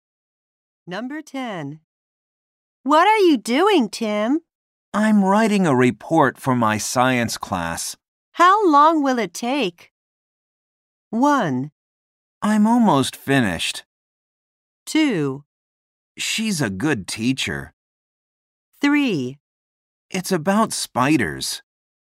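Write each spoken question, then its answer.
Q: How long will it take?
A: 1: I'm almost finished.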